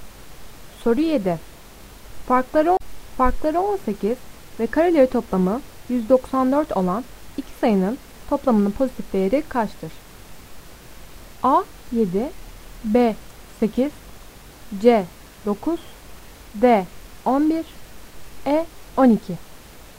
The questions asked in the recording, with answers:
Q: Farkları 18 ve kareleri toplamı 194 olan iki sayının toplamının pozitif değeri kaçtır?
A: Doğru cevap B 8.